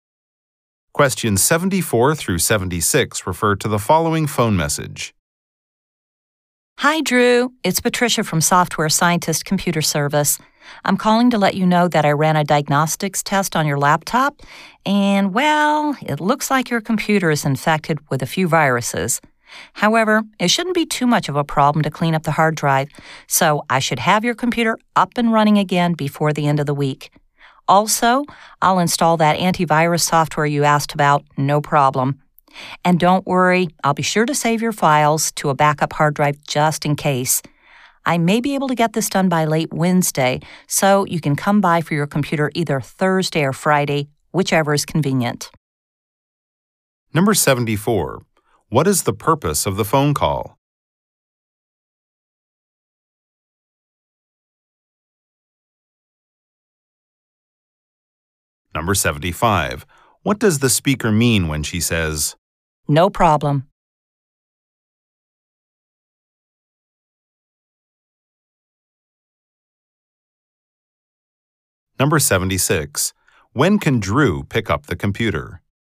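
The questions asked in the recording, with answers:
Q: What is the purpose of the phone call?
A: To report on the repair of Drew's computer.

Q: What does the speaker mean when she says,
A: She can easily install the antivirus software.

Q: When can Drew pick up the computer?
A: Thursday or Friday.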